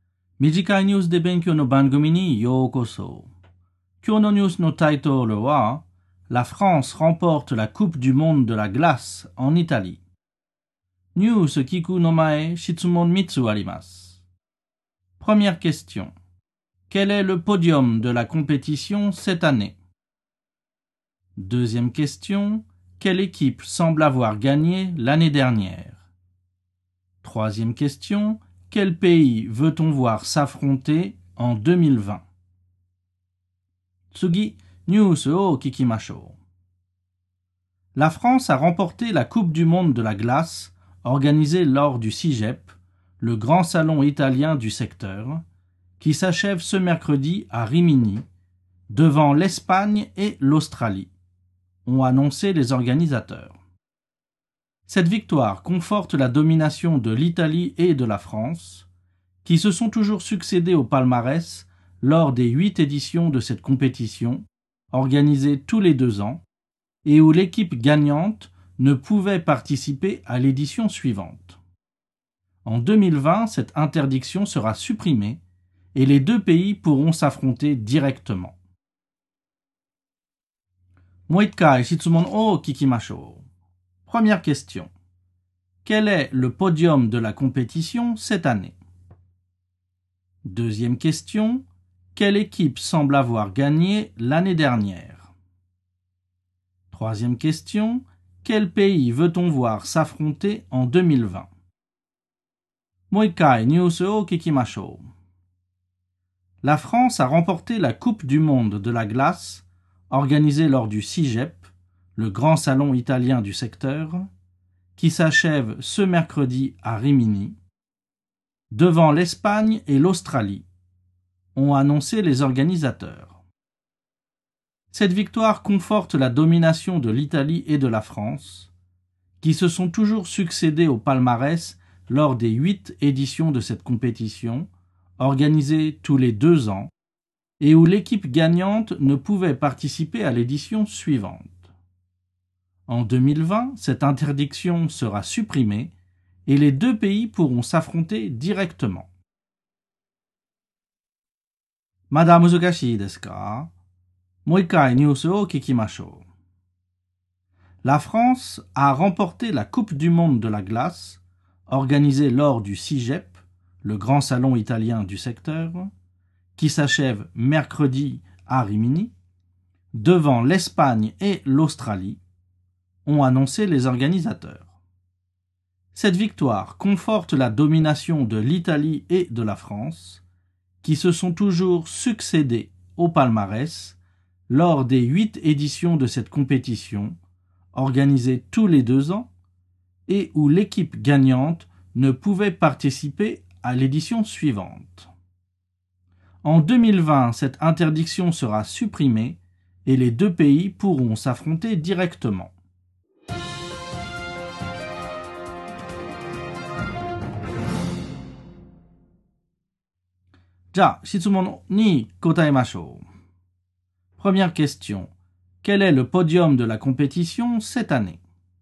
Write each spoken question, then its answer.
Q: Quel est le podium de la compétition cette année?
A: Le premier pays est la France. Le deuxième pays est l'Espagne. Et le troisième est l'Australie.

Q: Quelle équipe semble avoir gagné l'année dernière?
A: L'Italie semble avoir gagné l'année dernière.

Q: Quel pays veut-on voir s'affronter en 2020?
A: On veut voir l'Italie affronter la France.